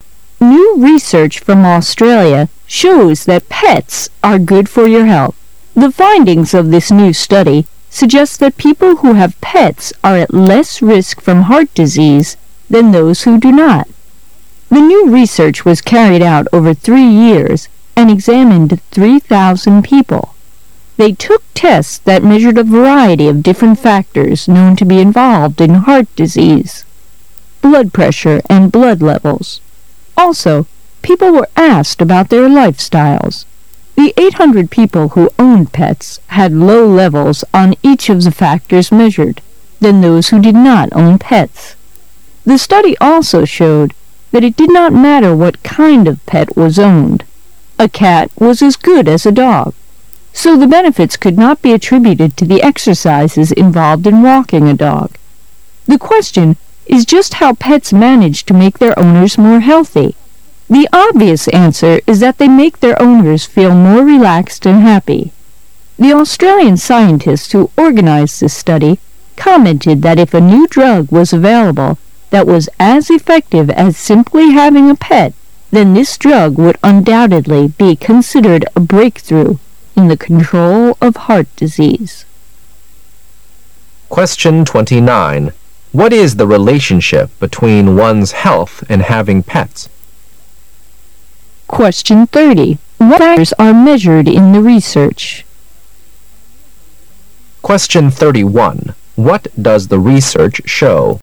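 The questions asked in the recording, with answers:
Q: What is the relationship between one's health and having pets?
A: Pets are good for health; pet owners are at less risk of heart disease.

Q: What factors are measured in the research?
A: Factors involved in heart disease, such as blood pressure and blood levels.

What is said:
A
[解析] 29-31 New research from Australia shows that pets are good for your health. The findings of this new study suggest that people who have pets are at less risk from heart disease than those who do not. The new research was carried out over three years and examined 3,000 people. They took tests that measured a variety of different factors known to be involved in heart disease -- blood pressure and blood levels. Also, people were asked about their lifestyles. The 800 people who owned pets had low levels on each of the factors measured than those who did not own pets. 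The study also showed that it did not matter what kind of pet was owned -- a cat was as good as a dog -- so the benefits could not be attributed to the exercises involved in walking a dog. The question is just how pets manage to make their owners more healthy. The obvious answer is that they make their owners feel more relaxed and happy. The Australian scientists who organized this study commented that if a new drug was available that was as effective as simply having a pet ,then this drug would undoubtedly be considered a breakthrough in the control of heart disease.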